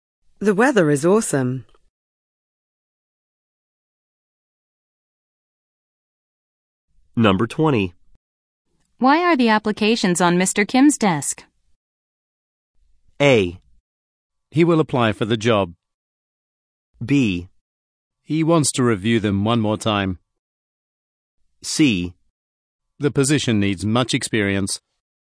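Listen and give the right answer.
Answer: B: He wants to review them one more time.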